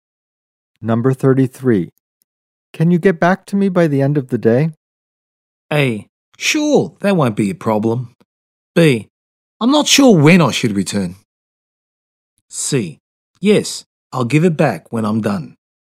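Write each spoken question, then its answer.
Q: Can you get back to me by the end of the day?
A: A: Sure, that won't be a problem.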